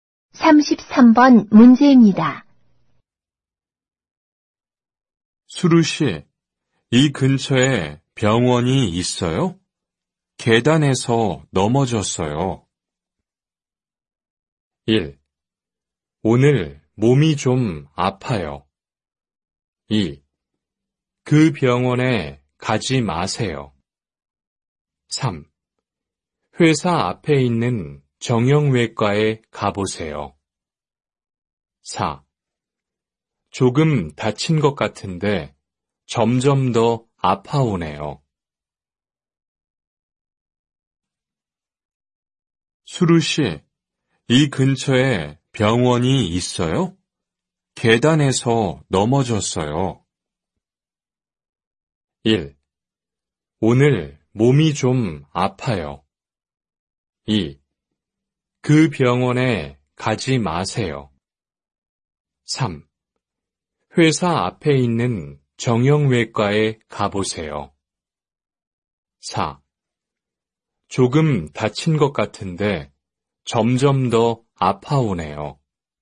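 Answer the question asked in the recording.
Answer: 3: 회사 앞에 있는 정형외과에 가보세요.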